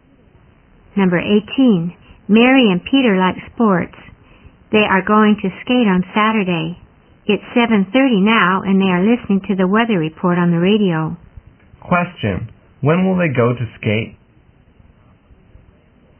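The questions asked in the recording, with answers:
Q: When will they go to skate?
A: On Saturday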